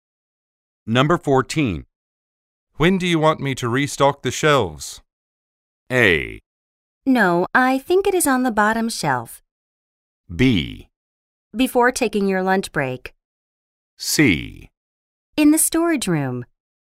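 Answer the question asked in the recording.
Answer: B: Before taking your lunch break.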